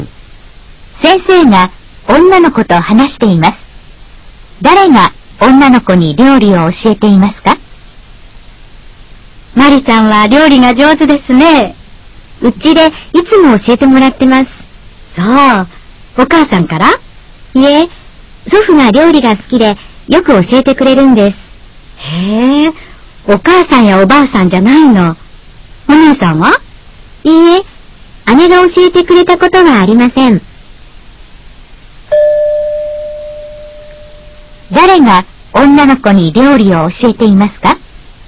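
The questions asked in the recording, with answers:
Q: 誰が女の子に料理を教えていますか?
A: 祖父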